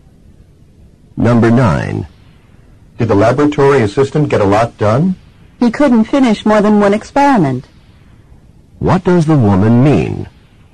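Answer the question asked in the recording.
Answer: The assistant finished only one experiment.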